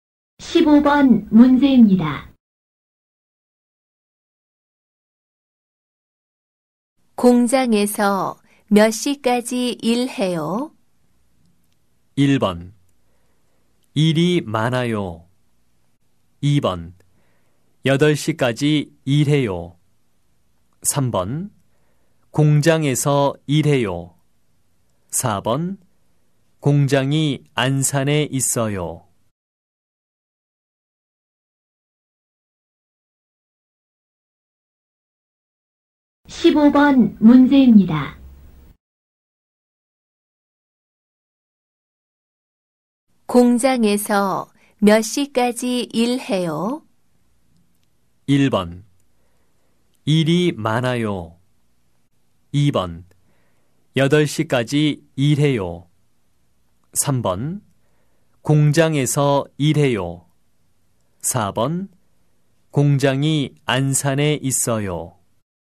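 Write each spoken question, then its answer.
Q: 공장에서 몇 시까지 일해요?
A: 2: 8시까지 일해요.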